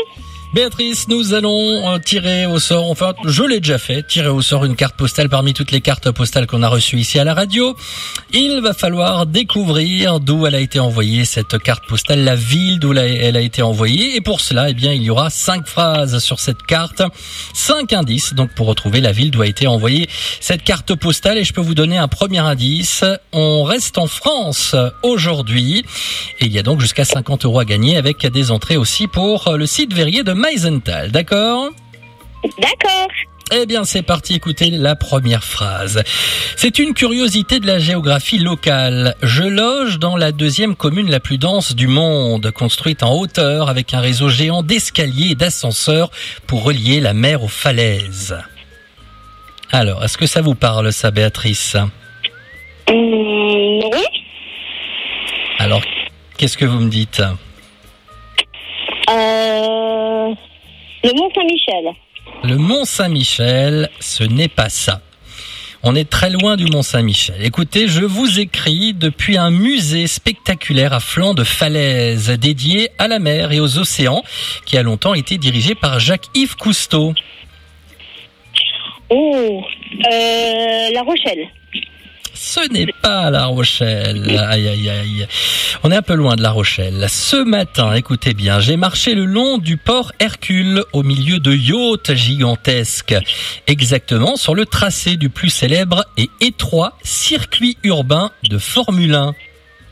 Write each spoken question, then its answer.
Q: Il va falloir découvrir d'où elle a été envoyée, cette carte postale, la ville d'où elle a été envoyée.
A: Et c'est Monaco.